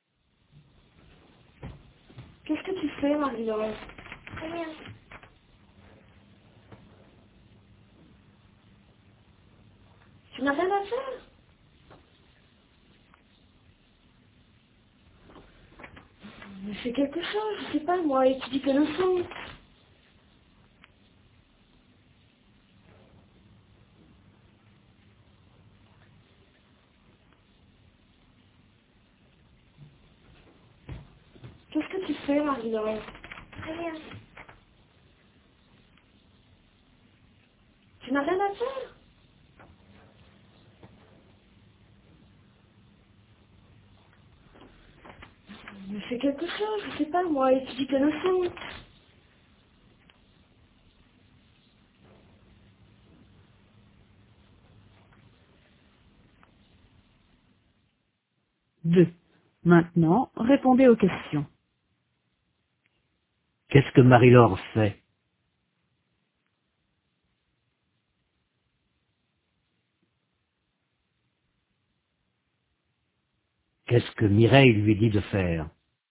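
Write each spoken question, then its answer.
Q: Qu'est-ce que Mireille lui dit de faire?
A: D'étudier ses leçons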